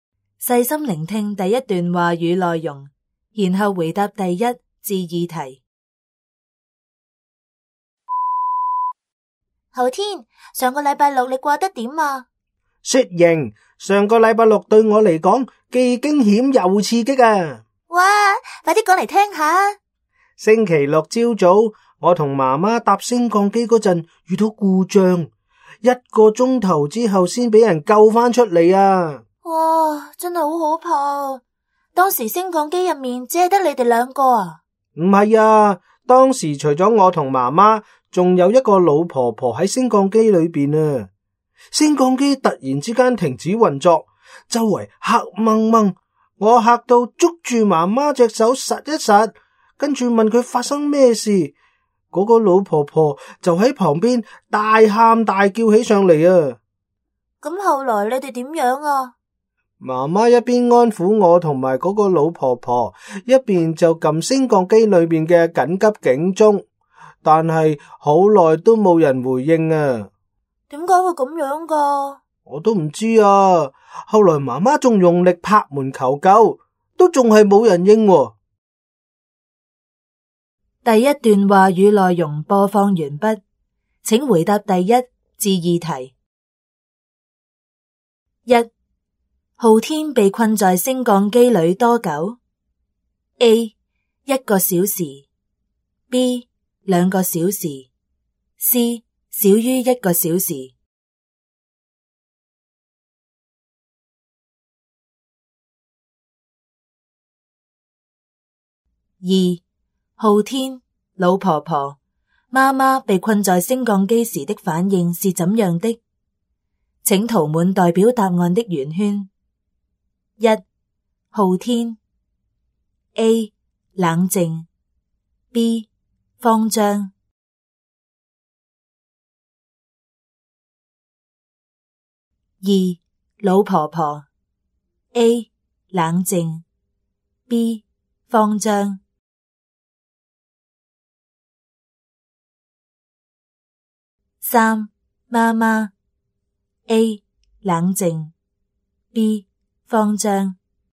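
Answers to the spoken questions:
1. A: 一个小时
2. B: 慌张
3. B: 慌张
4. A: 冷静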